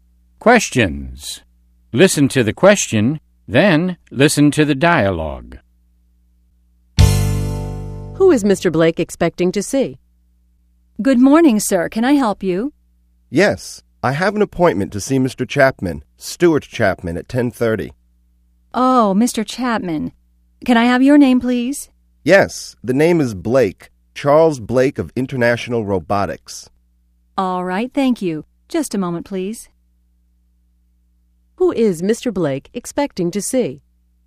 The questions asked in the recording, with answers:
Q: Who is Mr. Blake expecting to see?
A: He's expecting to see Mr. Chapman. He has an appointment to see him at 10:30.